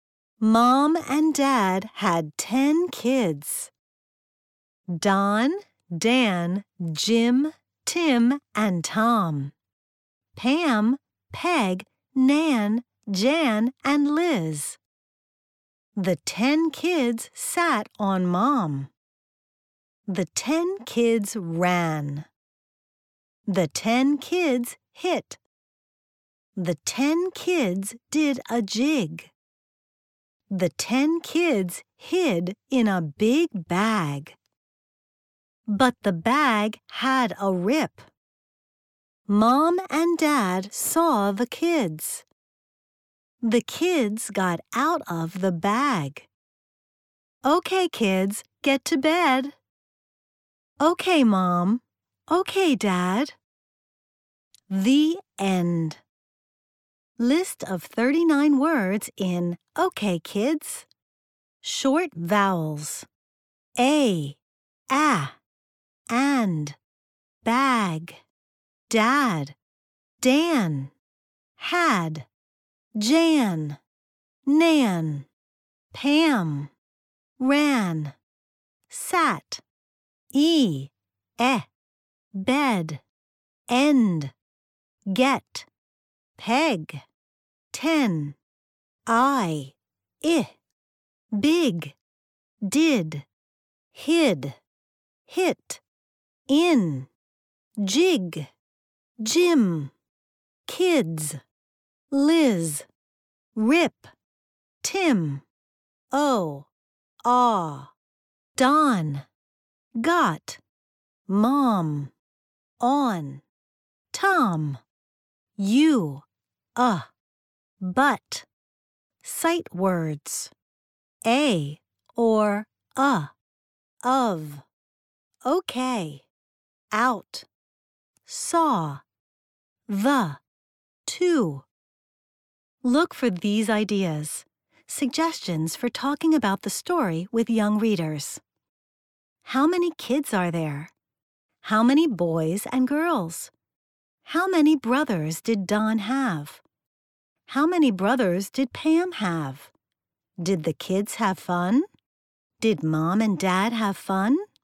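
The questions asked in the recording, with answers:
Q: How many kids are there?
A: 10

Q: How many boys and girls?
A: 5 boys and 5 girls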